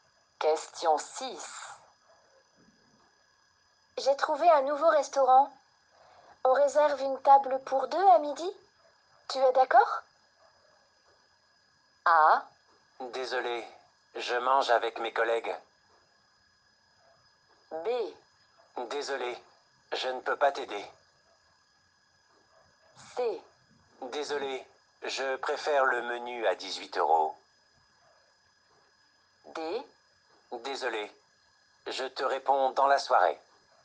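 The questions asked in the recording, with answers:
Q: Tu es d'accord?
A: A: Désolé, je mange avec mes collègues.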